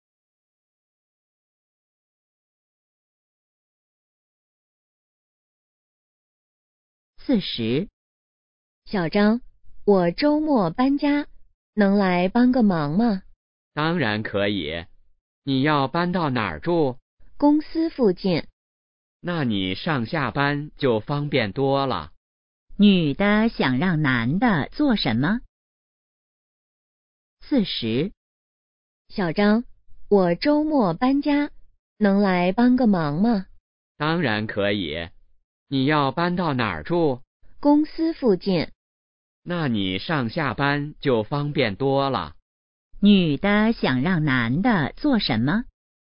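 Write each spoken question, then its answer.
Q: 女的想让男的做什么?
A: 周末帮忙搬家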